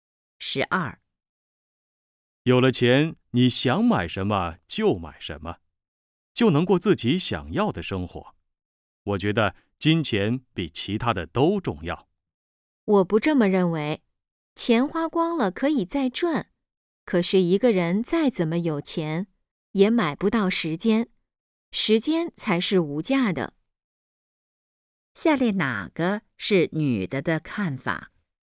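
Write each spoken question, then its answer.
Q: 下列哪个是女的的看法?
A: 时间是无价的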